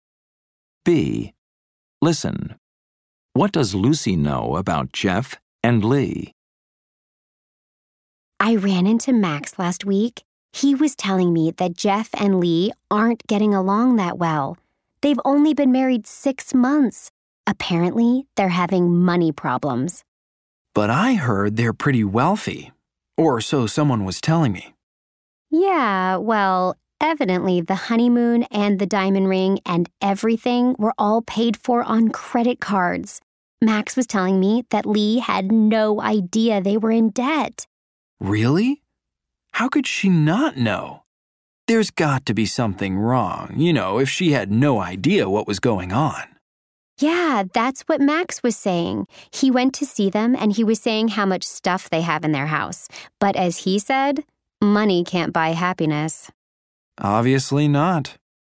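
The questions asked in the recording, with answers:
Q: What does Lucy know about Jeff and Lee?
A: They aren't getting along well and have money problems: their honeymoon and ring were paid for on credit cards, and Lee didn't know they were in debt.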